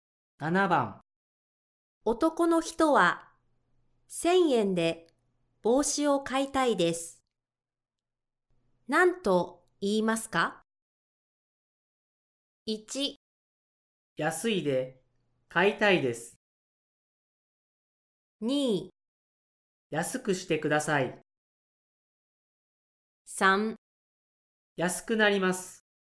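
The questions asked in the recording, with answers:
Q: 男の人は1000円で帽子を買いたいです。何と言いますか?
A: 2: 安くしてください。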